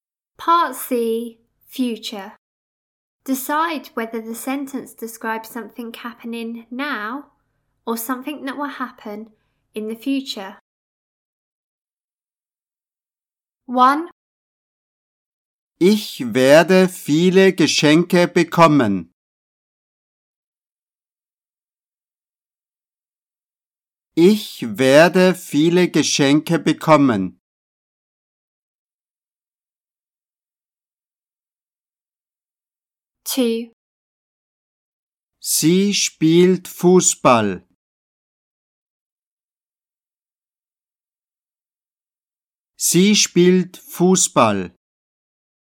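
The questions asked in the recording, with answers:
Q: Ich werde viele Geschenke bekommen.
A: future

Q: Sie spielt Fußball. Sie spielt Fußball.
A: now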